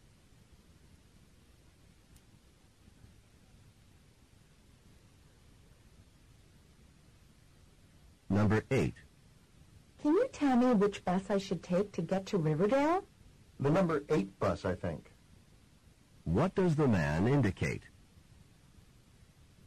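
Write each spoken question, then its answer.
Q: What does the man indicate?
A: He thinks the number eight bus goes to Riverdale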